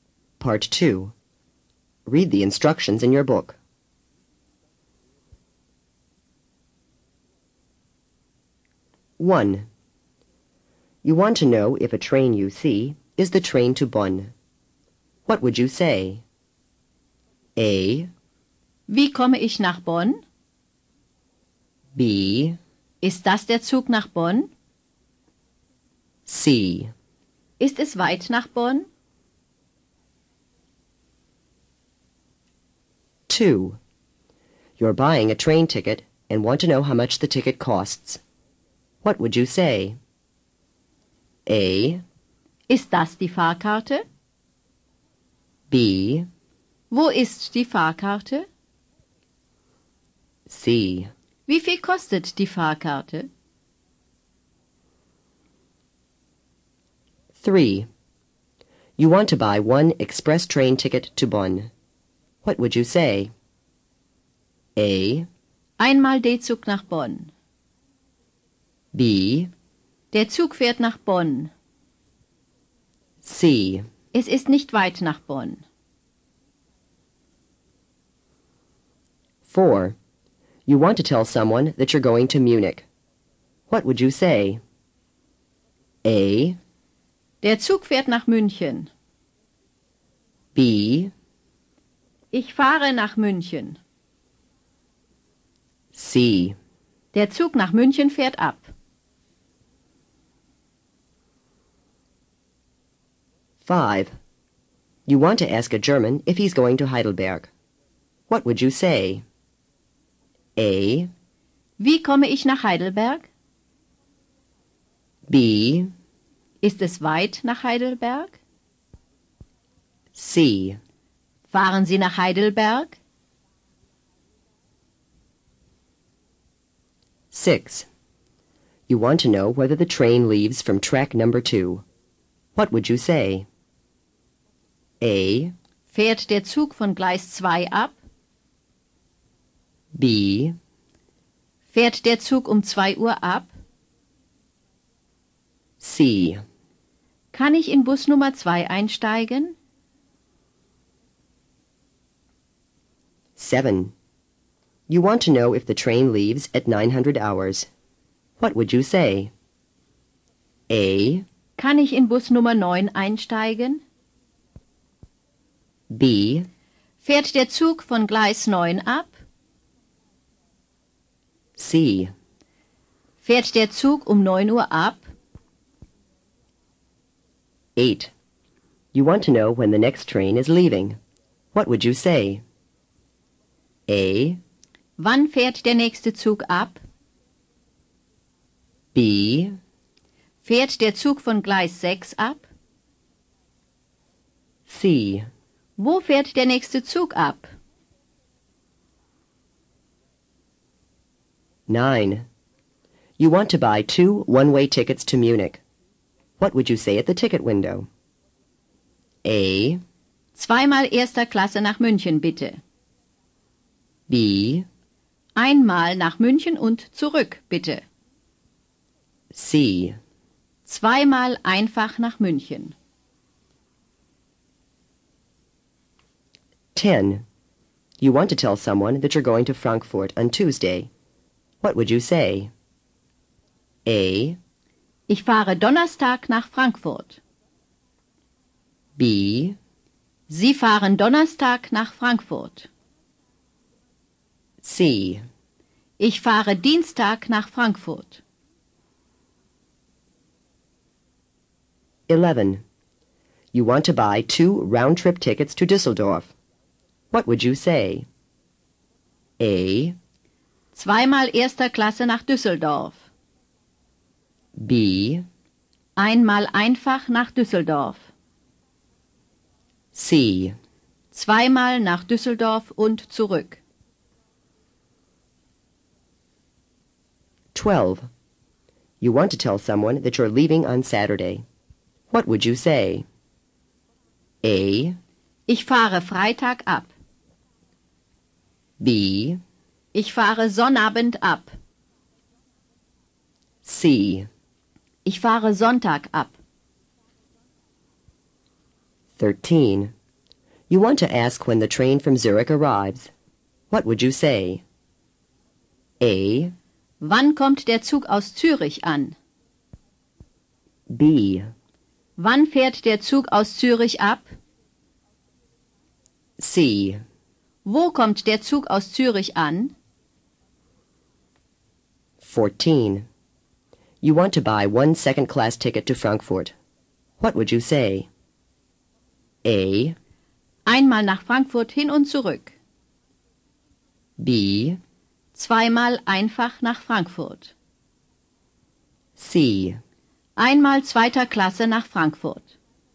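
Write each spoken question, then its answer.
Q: You want to know if a train you see is the train to Bonn. What would you say?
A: B: Ist das der Zug nach Bonn?

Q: You're buying a train ticket and want to know how much the ticket costs. What would you say?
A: C: Wie viel kostet die Fahrkarte?

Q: You want to buy one express train ticket to Bonn. What would you say?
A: A: Einmal D-Zug nach Bonn.

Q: You want to tell someone that you're going to Munich. What would you say?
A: B: Ich fahre nach München.

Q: You want to ask a German if he's going to Heidelberg. What would you say?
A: C: Fahren Sie nach Heidelberg?

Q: You want to know whether the train leaves from track number 2. What would you say?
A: A: Fährt der Zug von Gleis 2 ab?

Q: You want to know if the train leaves at 900 hours. What would you say?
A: C: Fährt der Zug um 9 Uhr ab?

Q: You want to know when the next train is leaving. 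What would you say?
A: A: Wann fährt der nächste Zug ab?

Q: You want to buy 2 one-way tickets to Munich. What would you say at the ticket window?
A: C: 2x einfach nach München.

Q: You want to tell someone that you're going to Frankfurt on Tuesday. What would you say?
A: C: Ich fahre Dienstag nach Frankfurt.

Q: You want to buy 2 round-trip tickets to Düsseldorf. What would you say?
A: C: 2x nach Düsseldorf und zurück.

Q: You want to tell someone that you're leaving on Saturday. What would you say?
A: B: Ich fahre Sonnabend ab.

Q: You want to ask when the train from Zurich arrives. What would you say?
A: A: Wann kommt der Zug aus Zürich an?

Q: You want to buy one second-class ticket to Frankfurt. What would you say?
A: C: Einmal zweiter Klasse nach Frankfurt.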